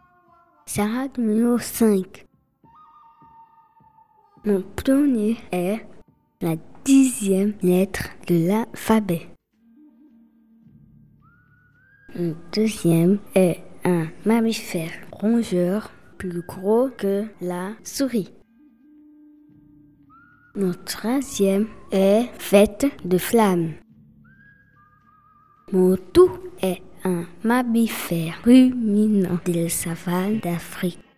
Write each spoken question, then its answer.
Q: Mon tout est un mammifère ruminant de la savane d'Afrique.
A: girafe.